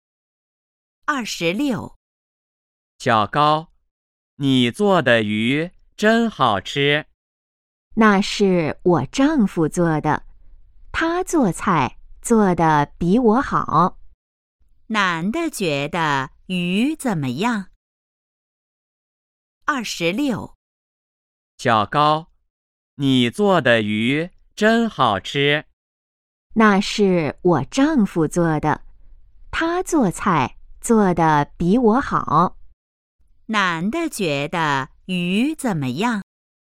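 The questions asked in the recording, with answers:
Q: 男的觉得鱼怎么样?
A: 很好吃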